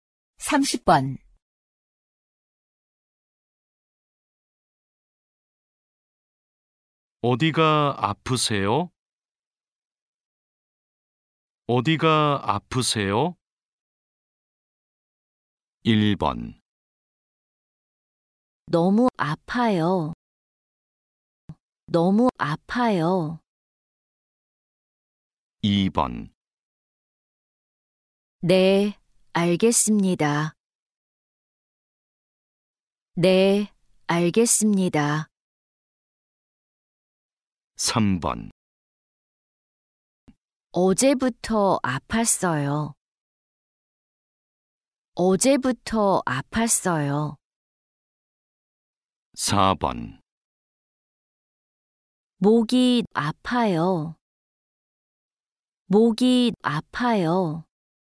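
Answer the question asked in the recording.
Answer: 4: 목이 아파요.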